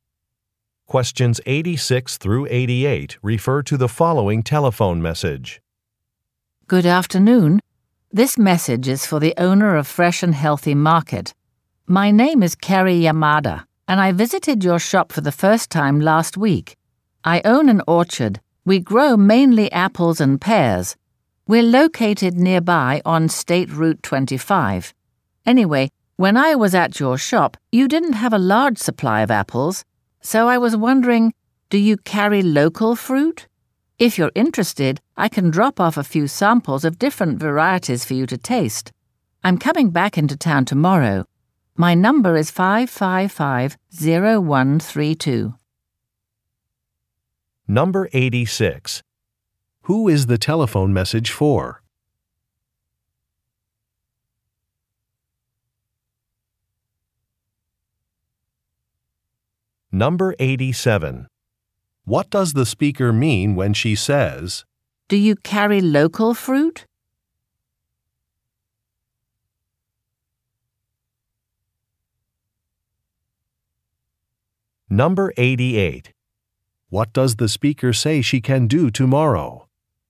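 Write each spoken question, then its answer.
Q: Who is the telephone message for?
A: The owner of Fresh and Healthy Market

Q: What does the speaker say she can do tomorrow?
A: Drop off fruit samples to taste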